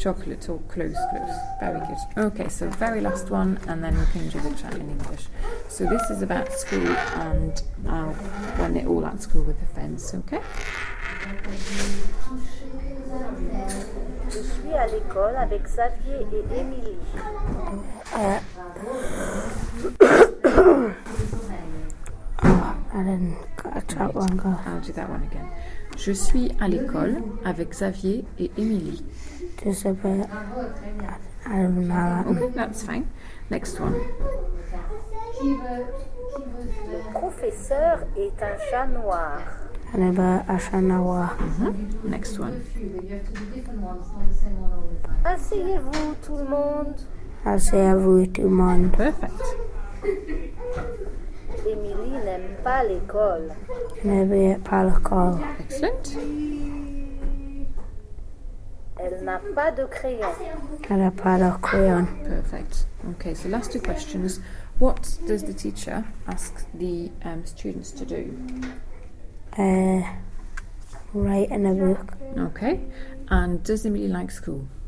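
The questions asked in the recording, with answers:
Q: What does the teacher ask the students to do?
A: Sit down

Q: And does Emily like school?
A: No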